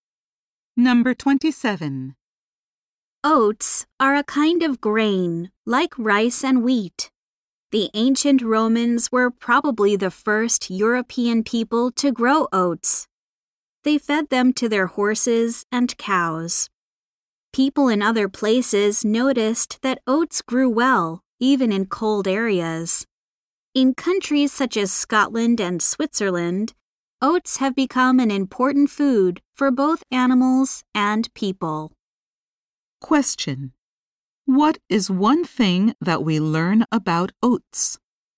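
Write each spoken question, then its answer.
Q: What is one thing that we learn about oats?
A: They grow well even in cold areas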